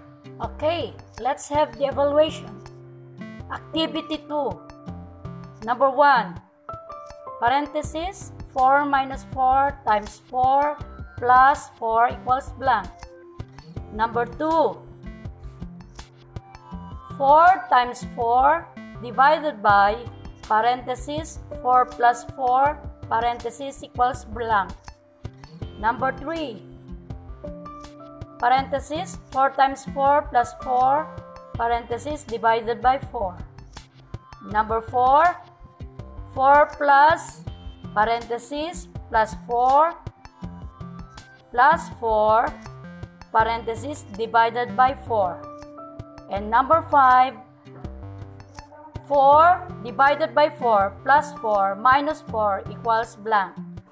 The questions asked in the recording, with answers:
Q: Number 1, parenthesis 4 minus 4 times 4 plus 4 equals blank.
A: Okay, the answer is 4.

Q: 4 times 4 divided by parenthesis 4 plus 4 parenthesis equals blank.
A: The answer is 2.

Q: Number 3, parenthesis 4 times 4 plus 4 parenthesis divided by 4.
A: Number 3, the answer is 5.

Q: And number 5, 4 divided by 4 plus 4 minus 4 equals blank.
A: And the last number, that is number 5, the answer is 1.